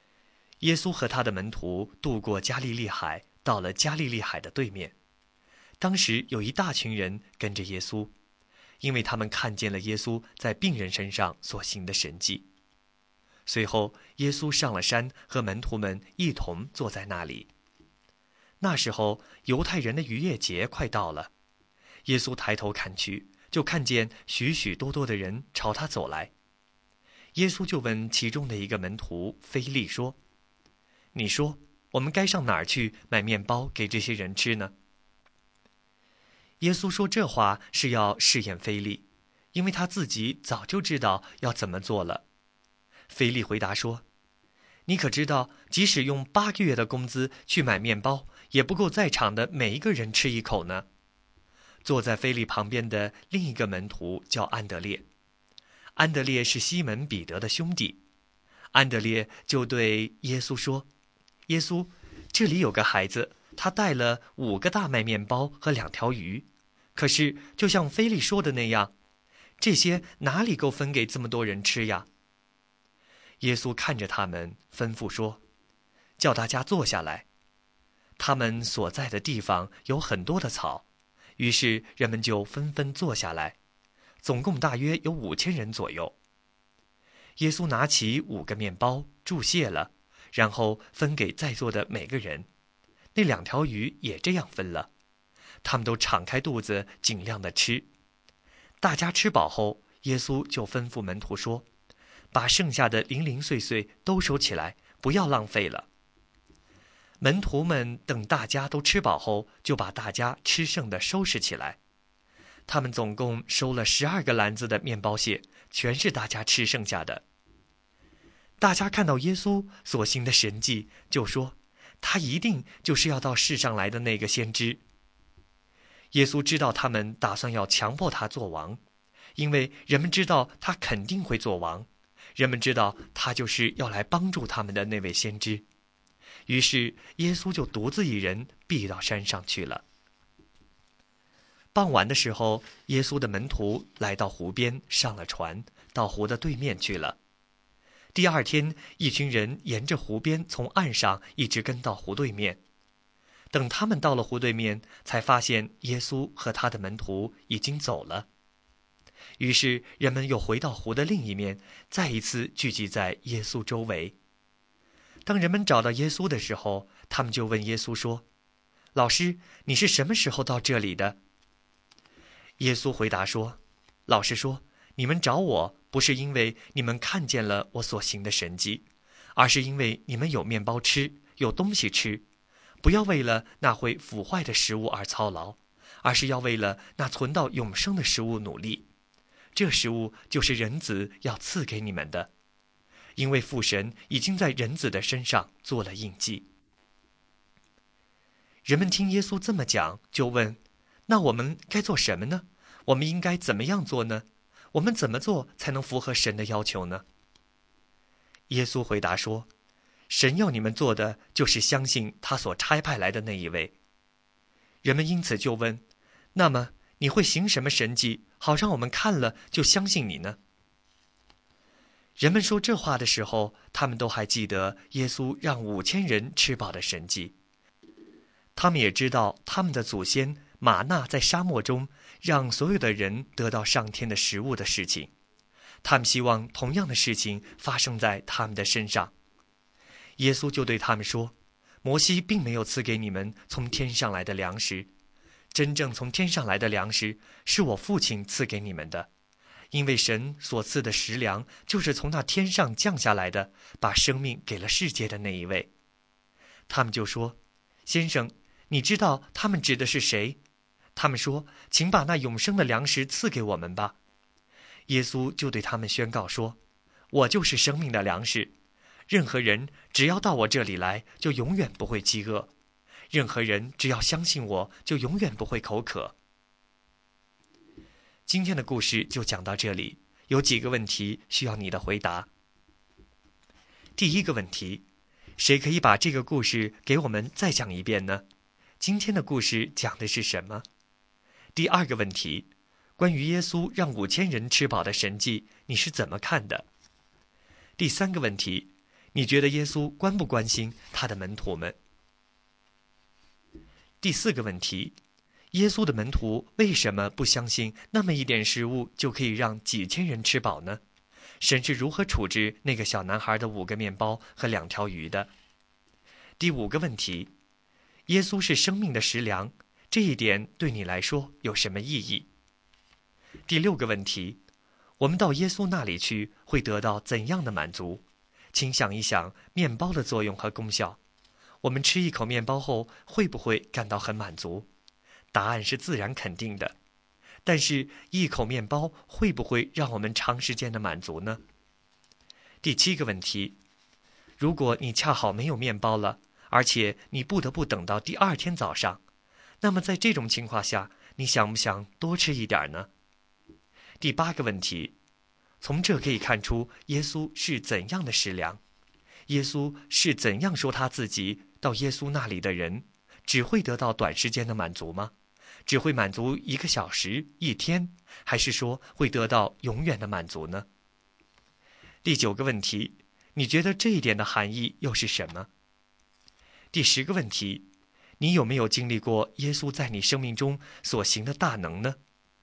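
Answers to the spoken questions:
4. 耶稣拿起面包祝谢了,分给在座的每个人,鱼也这样分了,五千人都吃饱了
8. 会得到永远的满足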